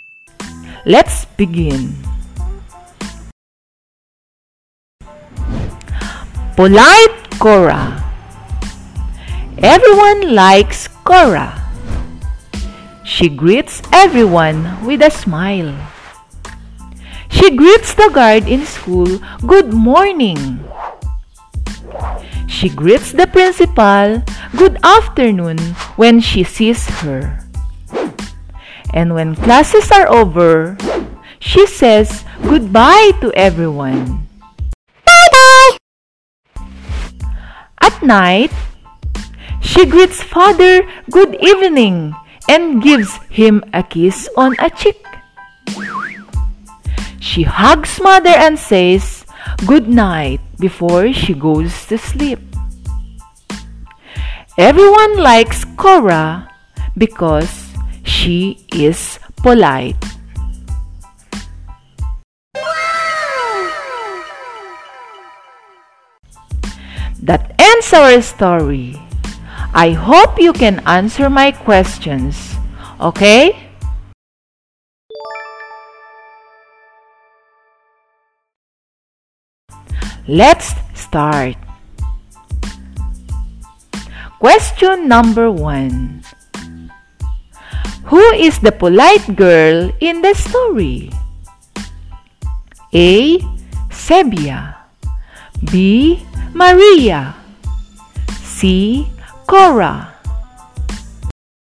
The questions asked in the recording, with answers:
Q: Who is the polite girl in the story?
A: The answer is letter C. The polite girl is Cora.